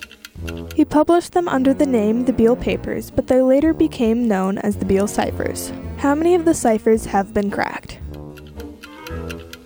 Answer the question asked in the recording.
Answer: Only one of the ciphers has been decoded.